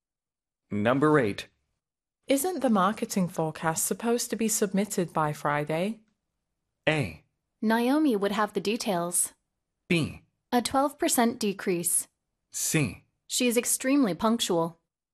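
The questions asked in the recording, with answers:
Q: Isn't the marketing forecast supposed to be submitted by Friday?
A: A: Naomi would have the details.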